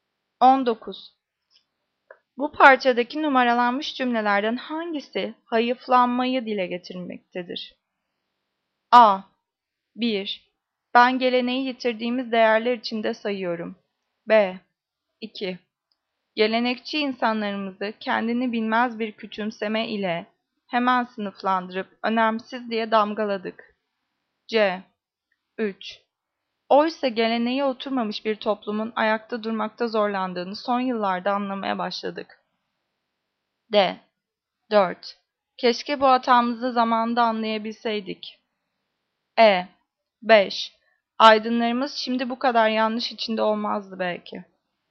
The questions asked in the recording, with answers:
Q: Bu parçadaki numaralanmış cümlelerden hangisi hayıflanmayı dile getirmektedir?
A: Cevap D. 4. Keşke bu hatamızı zamanımızda anlayabilseydik.